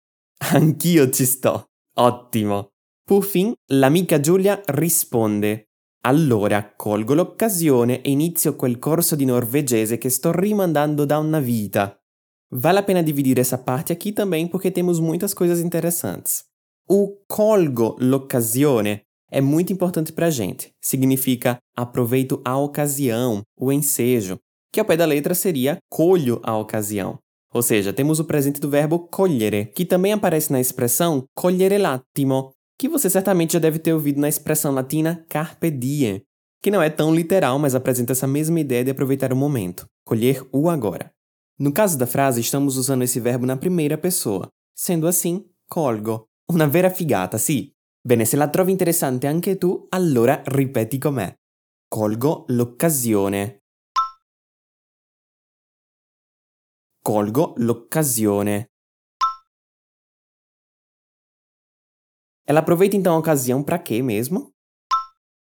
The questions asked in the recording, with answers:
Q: Ela aproveita então a ocasião para quê mesmo?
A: Isso, iniciar o curso de norueguês.